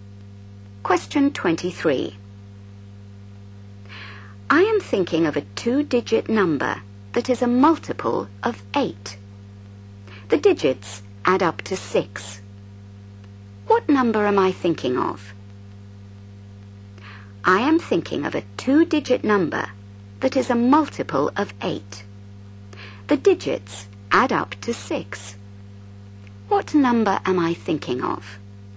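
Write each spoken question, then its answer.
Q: What number am I thinking of?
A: 24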